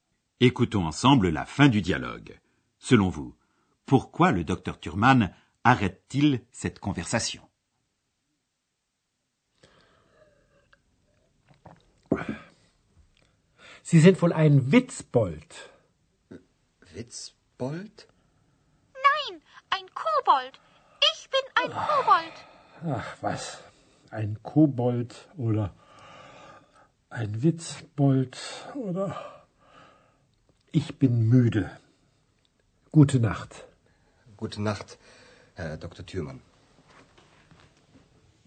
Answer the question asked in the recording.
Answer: Le docteur Thurman arrête cette conversation parce qu'il est müde, fatigué.